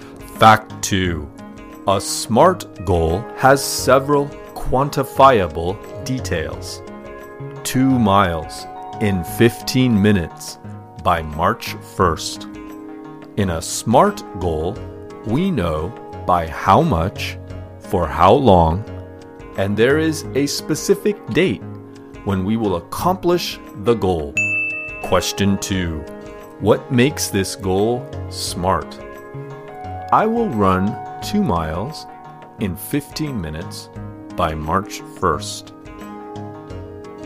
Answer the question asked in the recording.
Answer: What makes this goal smart is that there are several quantifiable details.